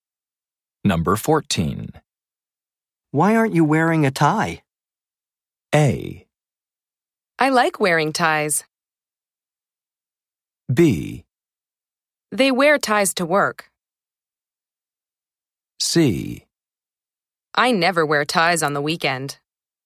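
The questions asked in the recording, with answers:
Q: Why aren't you wearing a tie?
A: C: I never wear ties on the weekend.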